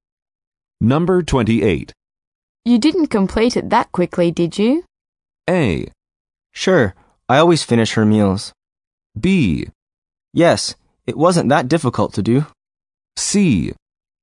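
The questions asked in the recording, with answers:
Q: You didn't complete it that quickly, did you?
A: B: Yes, it wasn't that difficult to do.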